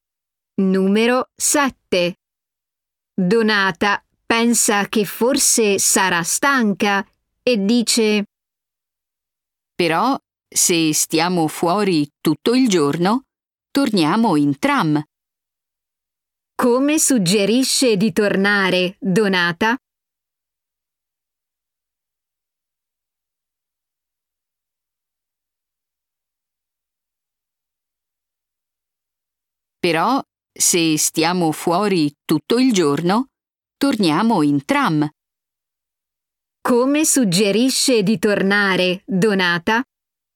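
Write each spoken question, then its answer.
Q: Come suggerisce di tornare, Donata?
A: in tram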